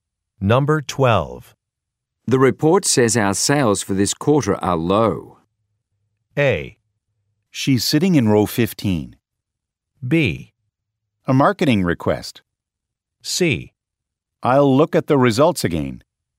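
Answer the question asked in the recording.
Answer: C: I'll look at the results again.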